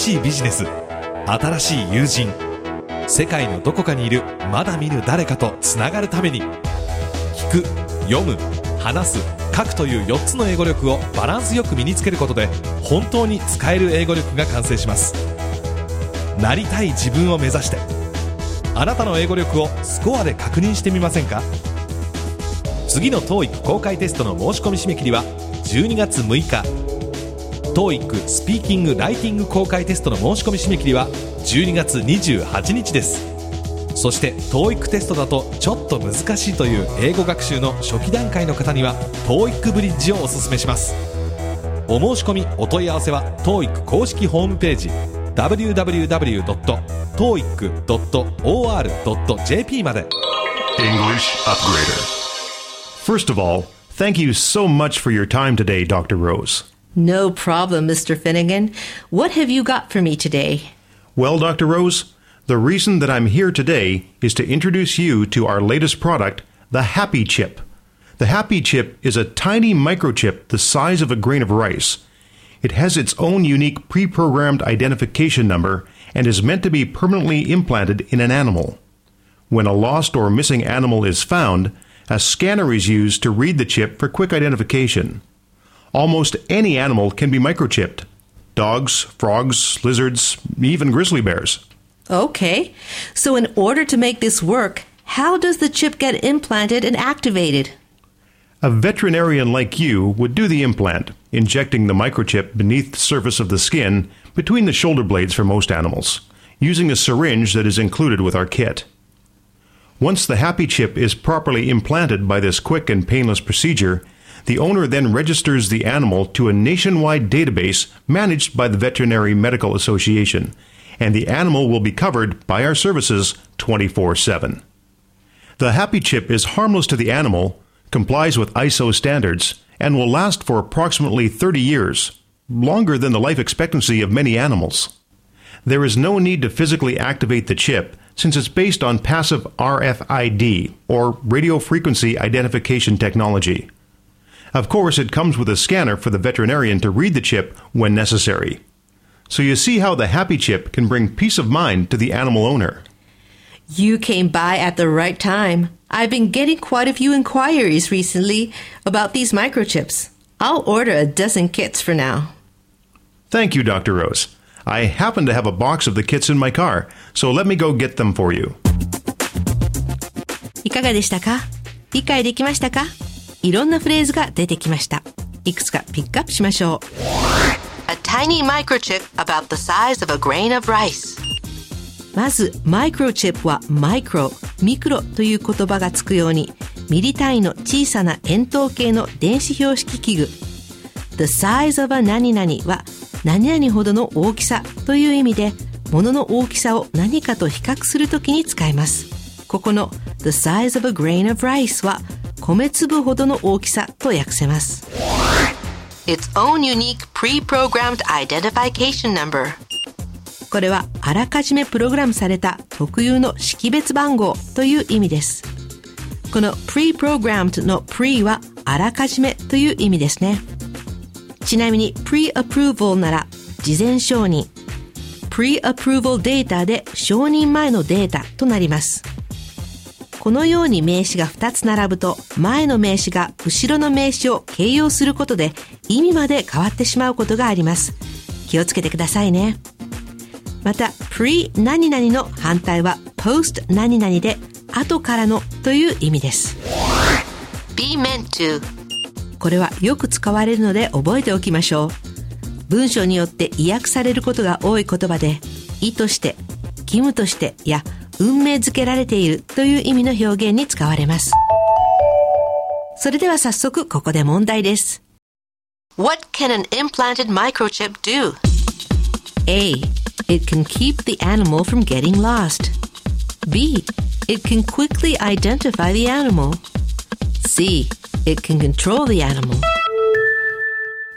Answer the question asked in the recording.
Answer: 正解は B のすぐに動物を識別できるですね。